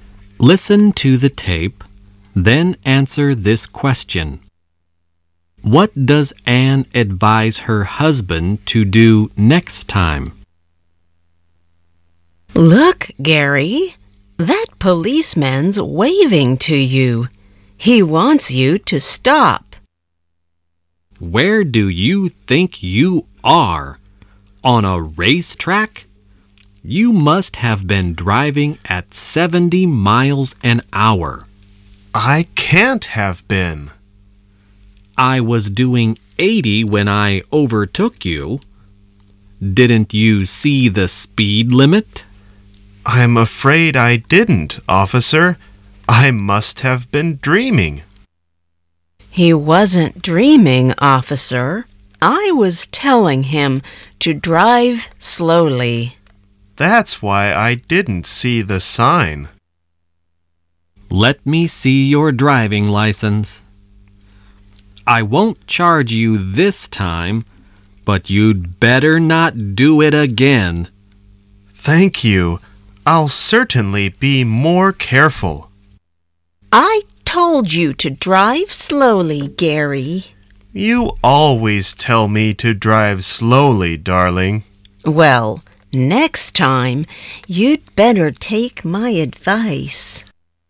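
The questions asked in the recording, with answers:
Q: What does Anne advise her husband to do next time?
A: To take her advice and drive slowly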